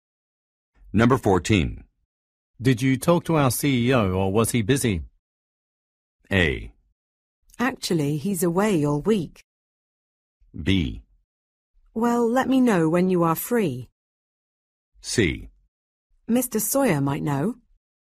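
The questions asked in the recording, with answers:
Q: Did you talk to our CEO or was he busy?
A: A: Actually, he's away all week.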